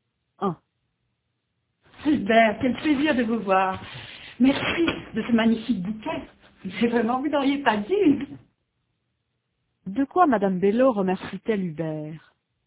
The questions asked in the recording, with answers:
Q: De quoi Madame Bello remercie-t-elle Hubert?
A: De son bouquet.